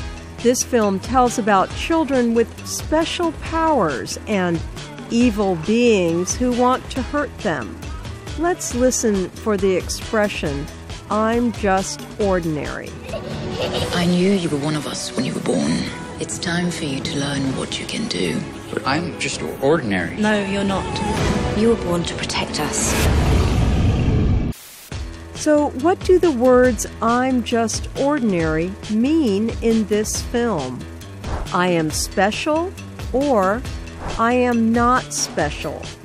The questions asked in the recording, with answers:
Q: So what do the words I'm just ordinary mean in this film?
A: I'm just ordinary means I am not special.